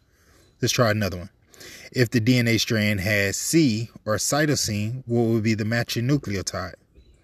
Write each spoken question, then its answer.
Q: If the DNA strand has C or cytosine, what would be the matching nucleotide?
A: If you chose guanine, you are 100% correct.